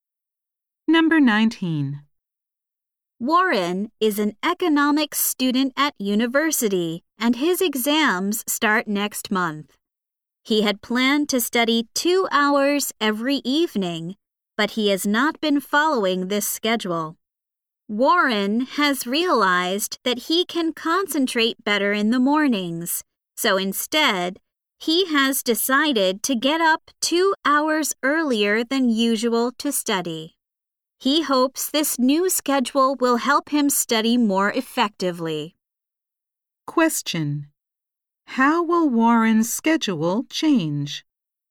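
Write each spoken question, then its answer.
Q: How will Warren's schedule change?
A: He will get up 2 hours earlier to study in the mornings instead of the evenings.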